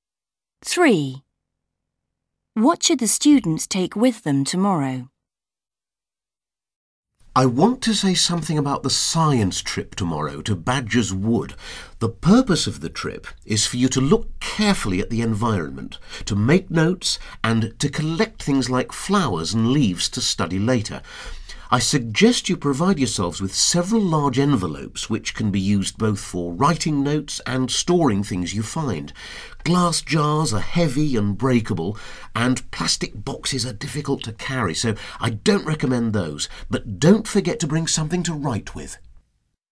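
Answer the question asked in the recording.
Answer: large envelopes and something to write with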